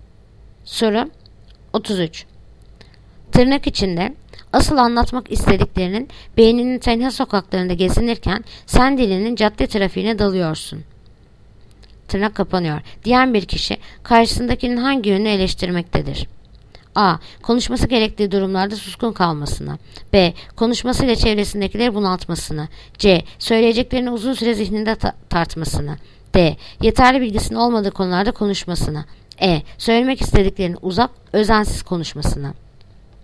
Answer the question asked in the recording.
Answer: Yanıt: Edirne. Söylemek istediklerinden uzak, özensiz konuşmasını.